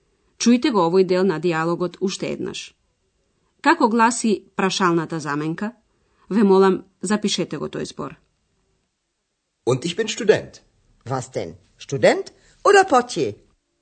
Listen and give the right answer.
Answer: Како трето, се бараше прашаната заменка вас, што.